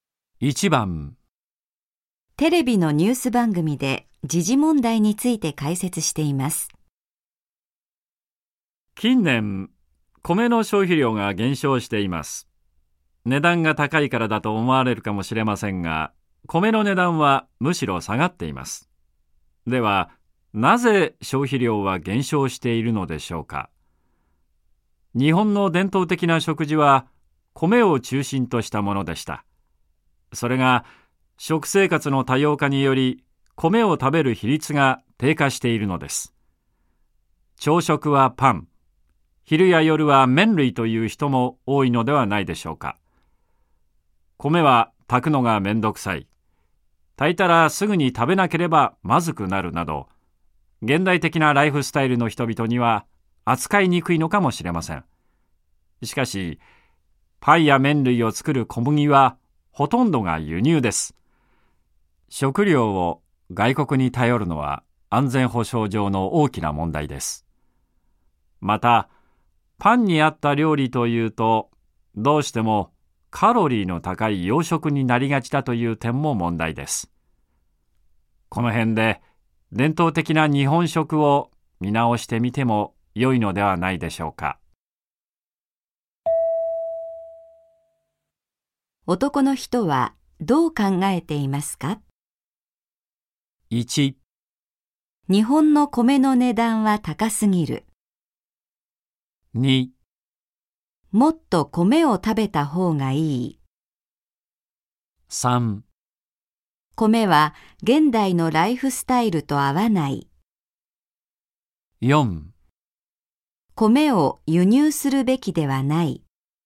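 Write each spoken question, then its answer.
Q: 男の人はどう考えていますか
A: 2: もっと米を食べた方がいい。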